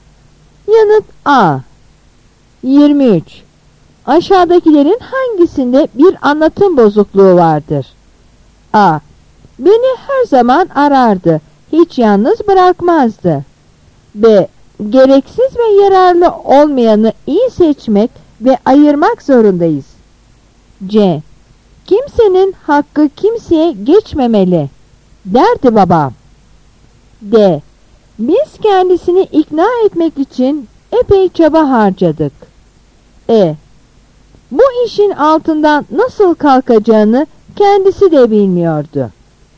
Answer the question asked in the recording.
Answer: Yanıt B.